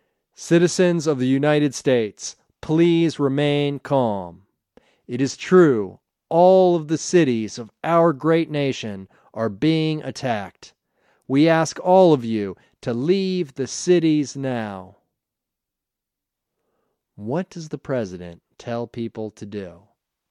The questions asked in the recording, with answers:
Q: What does the President tell people to do?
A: He tells them to remain calm and to leave the cities now.